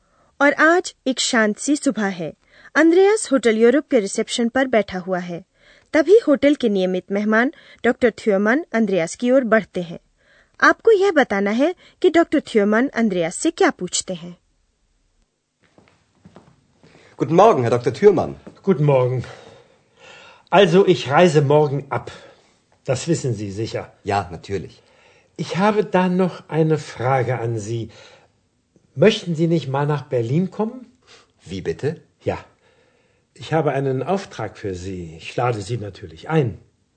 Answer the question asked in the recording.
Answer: doctor थ्योमन जा रहे हैं और अंद्रयास से पूछते हैं कि क्या वह Berlin नहीं आना चाहेगा